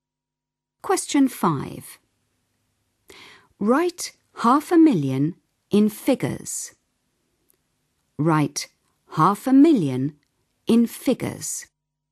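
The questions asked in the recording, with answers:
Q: Write 500,000 in figures.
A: 500000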